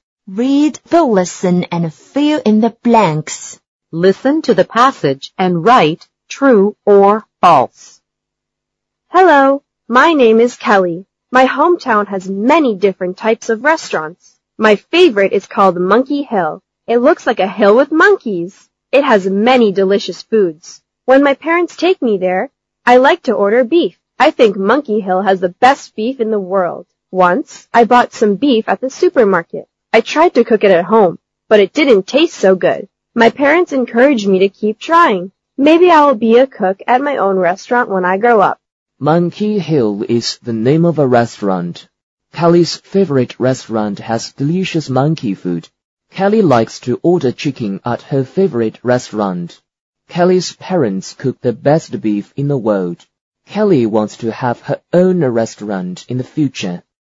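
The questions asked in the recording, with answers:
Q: Monkey Hill is the name of a restaurant.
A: True

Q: Kelly's favorite restaurant has delicious monkey food.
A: False

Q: Kelly likes to order chicken at her favorite restaurant.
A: False

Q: Kelly's parents cook the best beef in the world.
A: False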